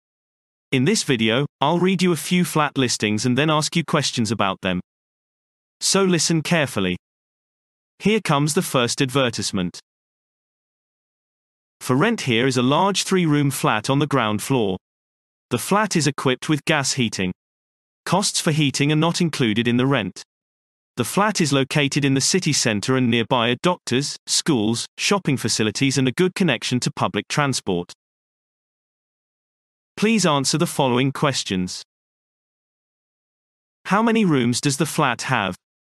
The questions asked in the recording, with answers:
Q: How many rooms does the flat have?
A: Answer. It is a three-room flat.